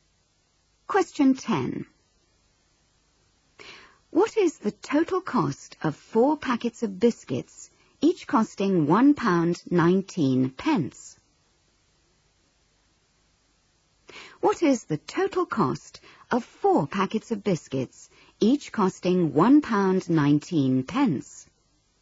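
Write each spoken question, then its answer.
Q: What is the total cost of 4 packets of biscuits, each costing £1.19?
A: £4.76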